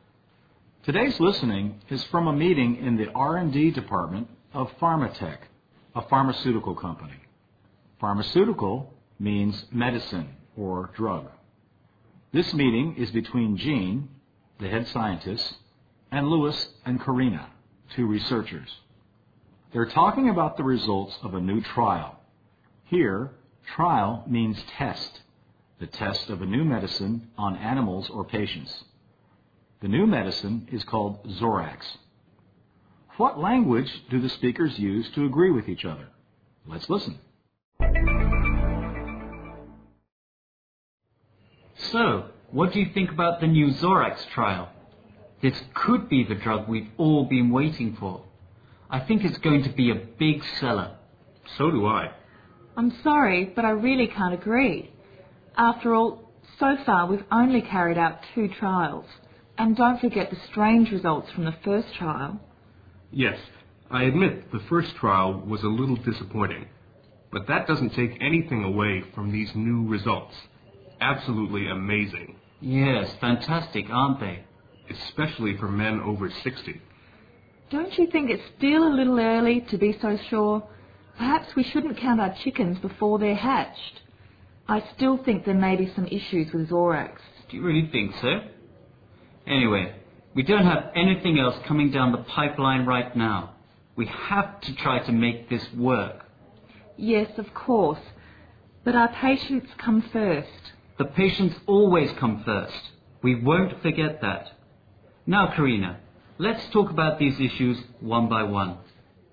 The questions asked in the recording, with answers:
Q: What language do the speakers use to agree with each other?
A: Here, the short answer, "so do I," means I think so too.